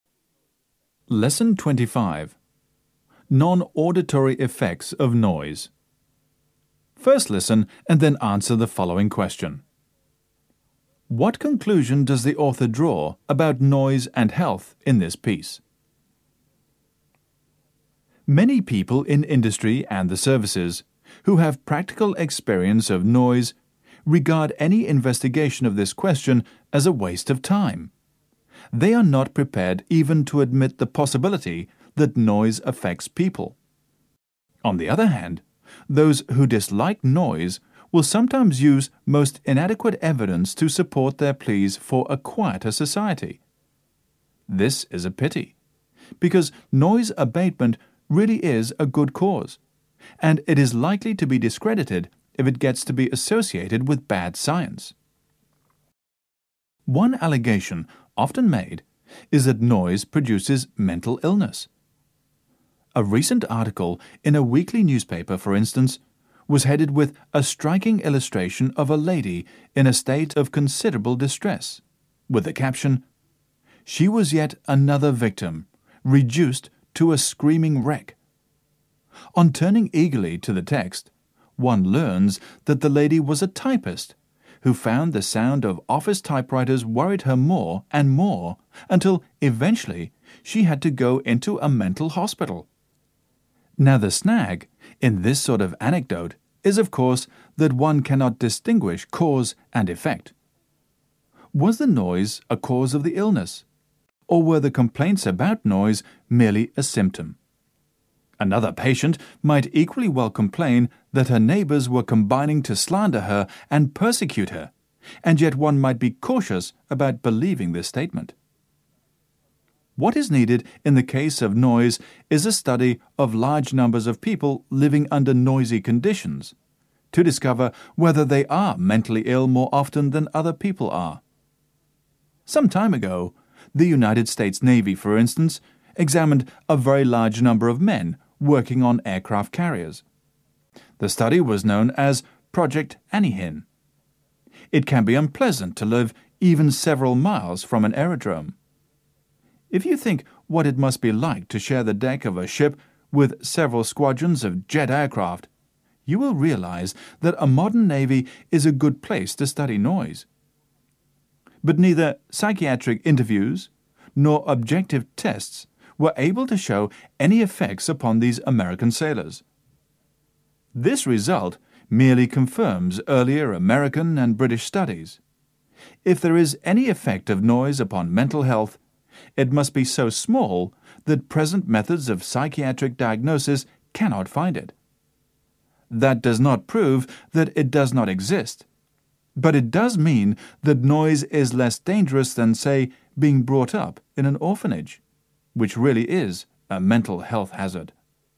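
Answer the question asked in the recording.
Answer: Any effect of noise on mental health is too small for present psychiatric methods to detect; it is not proven harmful.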